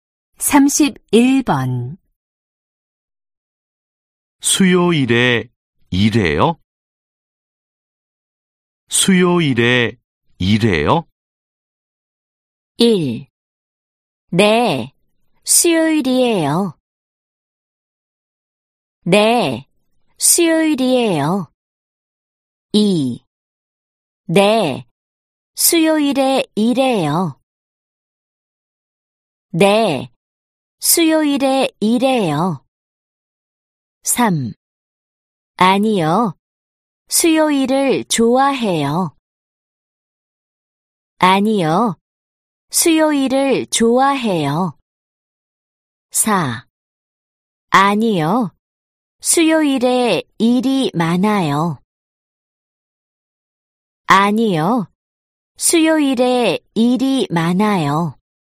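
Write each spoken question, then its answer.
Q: 수요일에 일해요?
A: 2: 네, 수요일에 일해요.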